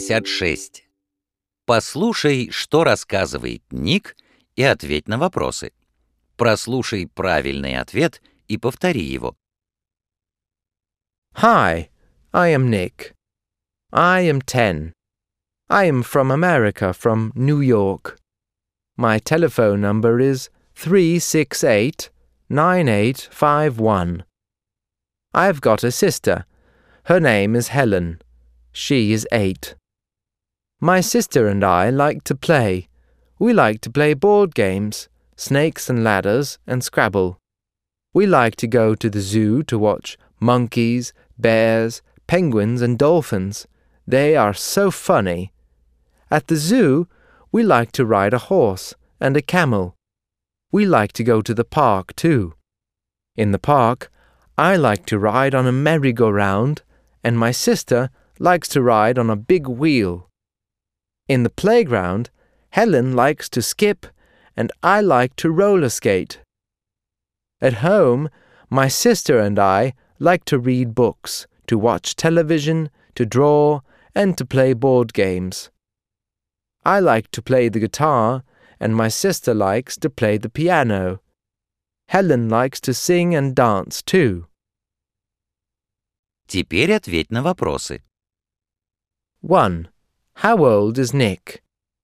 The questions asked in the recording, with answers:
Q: How old is Nick?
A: He is 10.